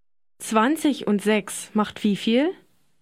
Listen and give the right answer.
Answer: 26.